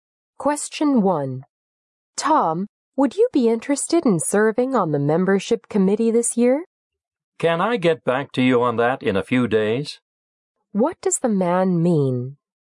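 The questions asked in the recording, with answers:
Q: What does the man mean?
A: He needs a few days to think about it before deciding.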